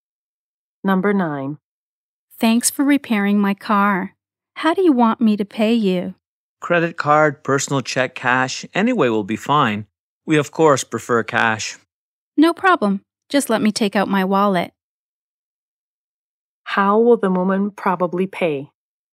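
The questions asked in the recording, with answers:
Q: How will the woman probably pay?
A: In cash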